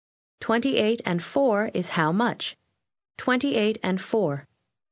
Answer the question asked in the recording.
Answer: 32.